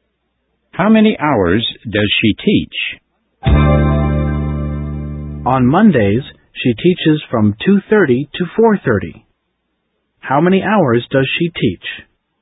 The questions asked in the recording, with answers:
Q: How many hours does she teach?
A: She teaches for 2 hours.